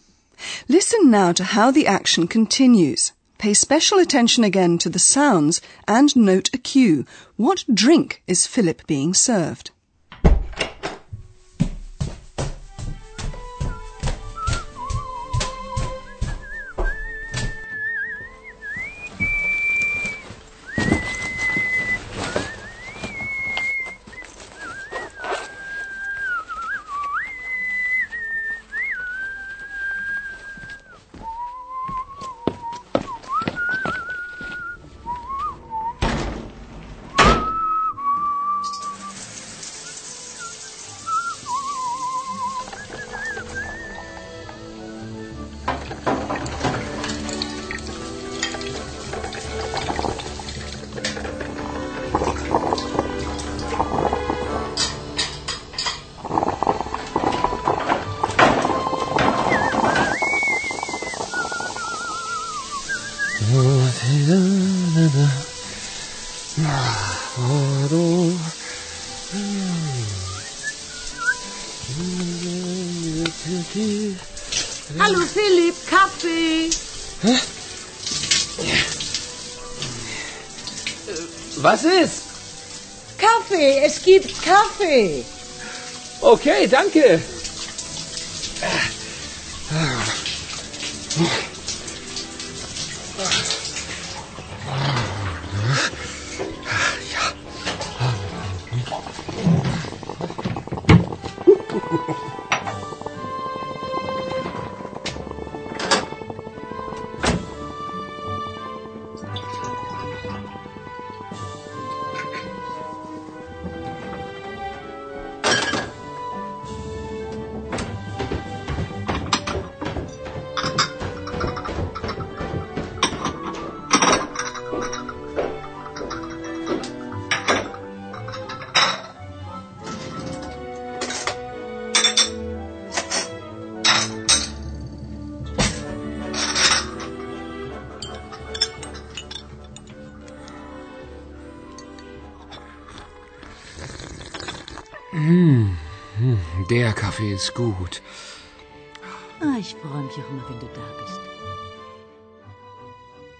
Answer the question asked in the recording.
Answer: he's treated to coffee by Hannah